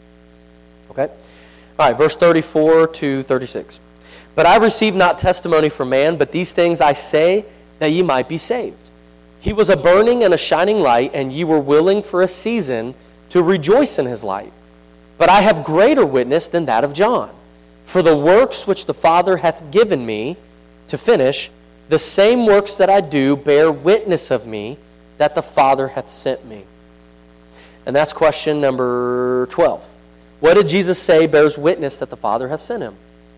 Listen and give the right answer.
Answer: His works